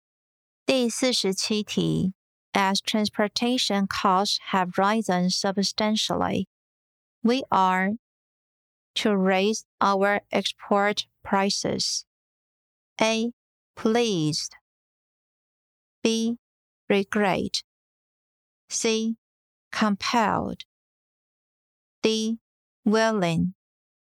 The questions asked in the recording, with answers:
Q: As transportation costs have risen substantially, we are to raise our export prices.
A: 正确答案为 C. Compelled.